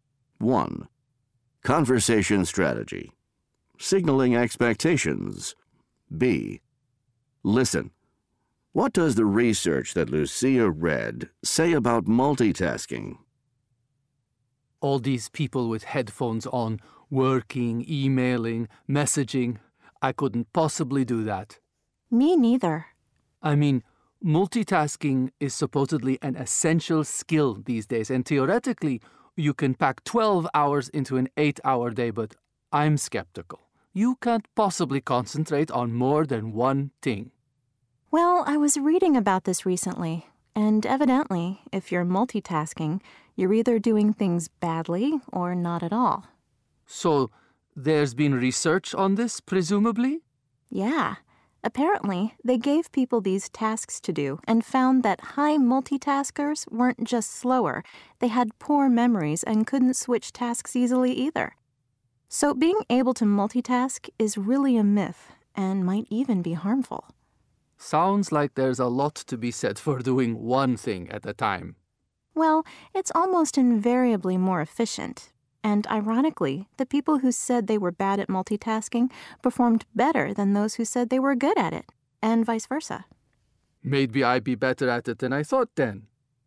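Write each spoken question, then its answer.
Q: What does the research that Lucia read say about multitasking?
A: If you multitask you do things badly or not at all; high multitaskers were slower, had poor memories and couldn't switch tasks easily, so multitasking is a myth and may be harmful.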